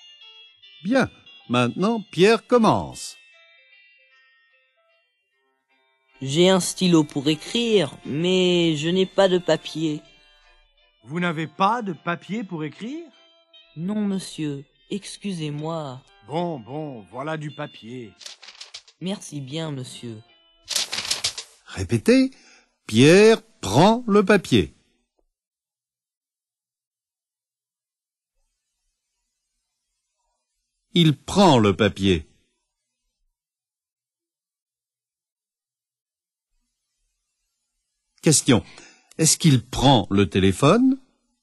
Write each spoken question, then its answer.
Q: Est-ce qu'il prend le téléphone?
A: Non, il ne prend pas le téléphone.